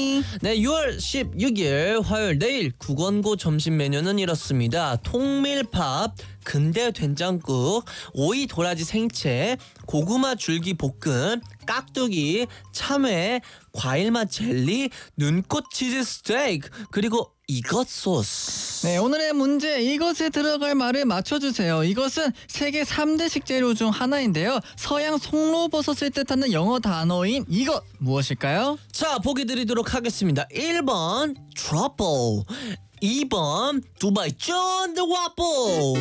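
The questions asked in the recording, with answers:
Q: 이것은 세계 3대 식재료 중 하나인데요. 서양 송로버섯을 뜻하는 영어 단어인 이것 무엇일까요?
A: 1: 트러플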